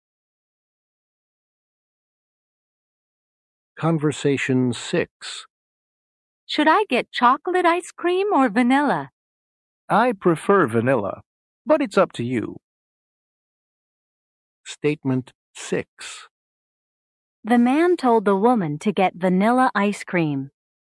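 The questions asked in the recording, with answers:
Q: The man told the woman to get vanilla ice cream.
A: False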